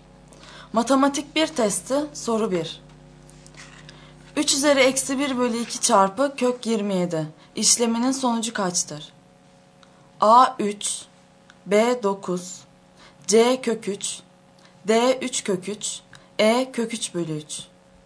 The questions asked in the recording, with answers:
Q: 3 üzeri eksi 1 bölü 2 çarpı kök 27 işleminin sonucu kaçtır?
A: Doğru yanıt A şıkkı.